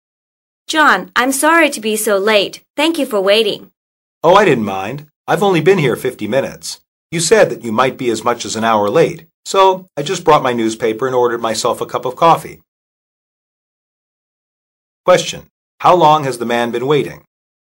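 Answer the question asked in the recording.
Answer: 50 minutes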